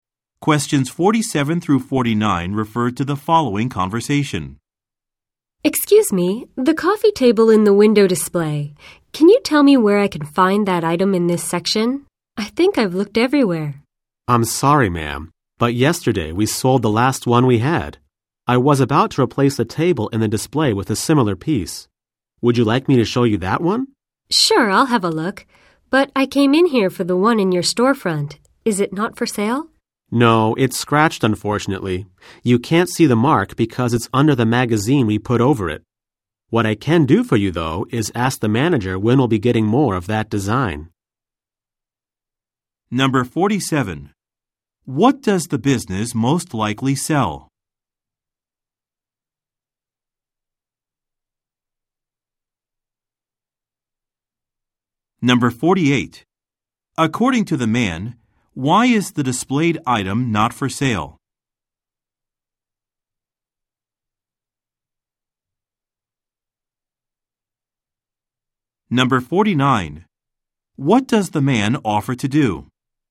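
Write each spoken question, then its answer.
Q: What does the business most likely sell?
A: Furniture

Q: According to the man, why is the displayed item not for sale?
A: It is scratched

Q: What does the man offer to do?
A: Ask the manager when more of that design will arrive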